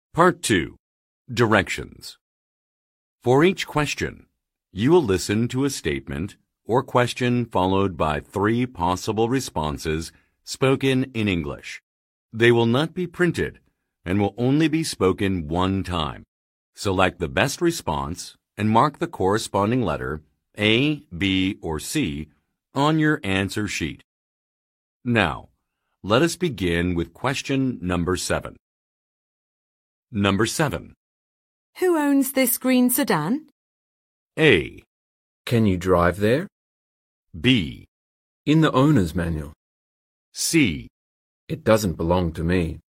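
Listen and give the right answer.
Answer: It doesn't belong to me.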